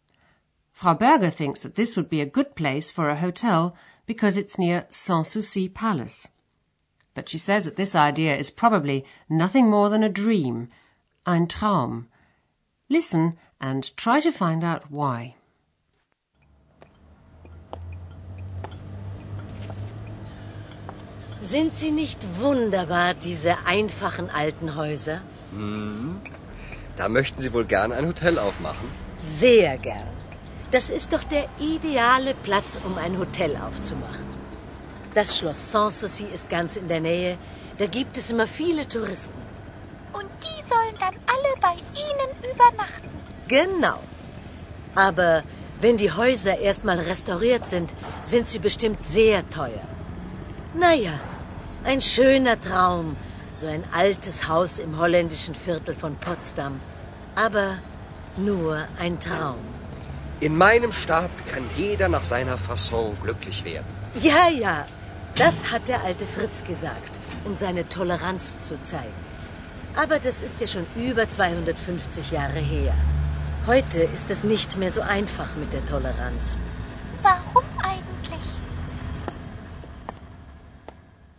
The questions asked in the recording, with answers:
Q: Listen and try to find out why.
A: Frau Berger reckons that the houses in the Dutch Quarter will be very expensive once they've been restored.